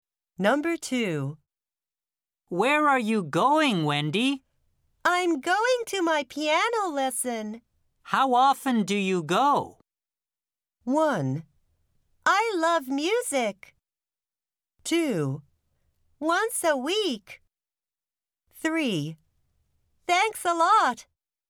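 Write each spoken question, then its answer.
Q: How often do you go?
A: 2: Once a week.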